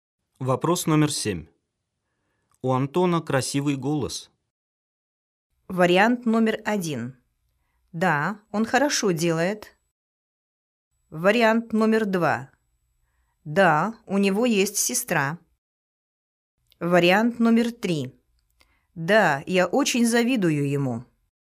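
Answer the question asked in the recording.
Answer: 3: Да, я очень завидую ему.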